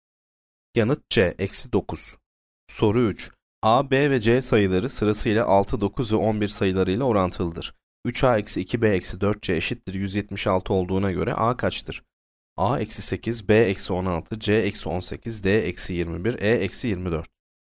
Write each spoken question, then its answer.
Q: 3a eksi 2b eksi 4c eşittir 176 olduğuna göre a kaçtır?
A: Yanıt E eksi 24.